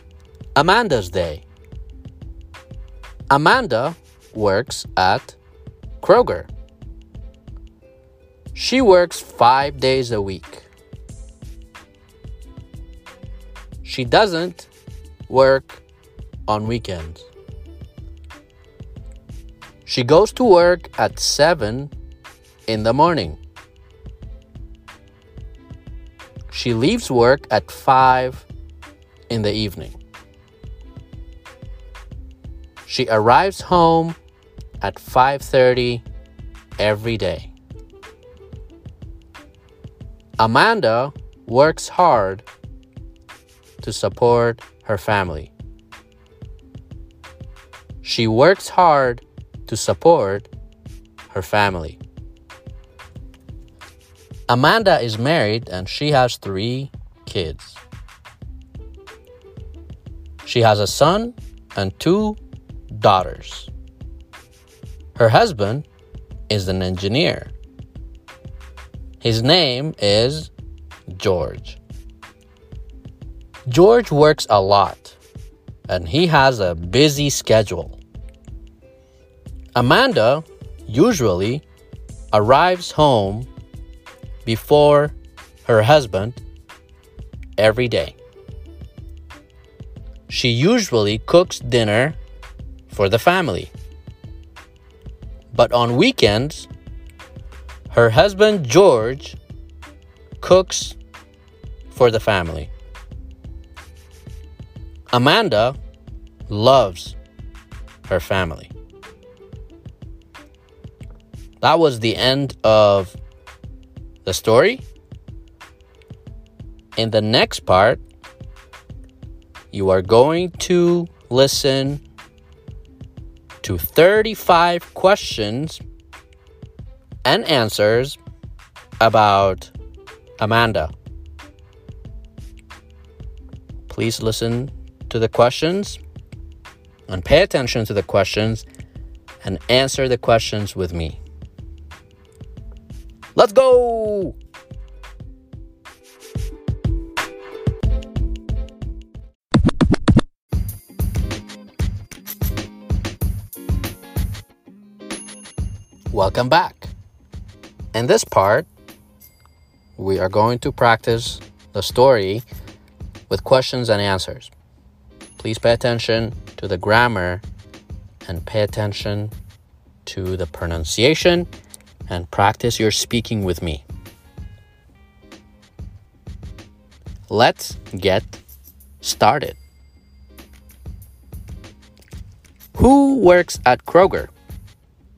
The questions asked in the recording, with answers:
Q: Who works at Kroger?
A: Amanda. Amanda works at Kroger.